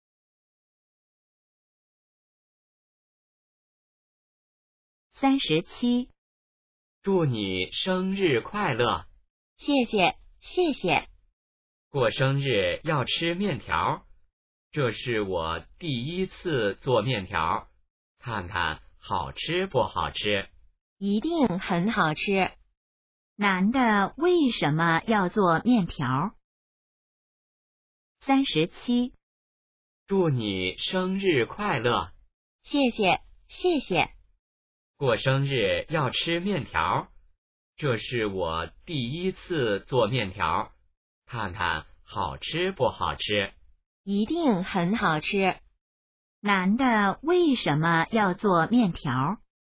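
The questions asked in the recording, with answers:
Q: 男的为什么要做面条?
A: 女的过生日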